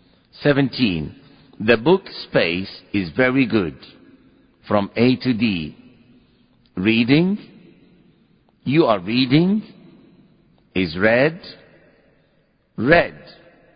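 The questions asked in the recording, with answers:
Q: The book, space, is very good.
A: B: you are reading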